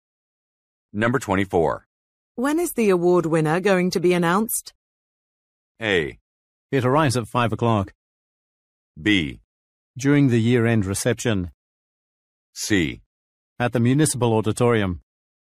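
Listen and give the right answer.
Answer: B: During the year-end reception.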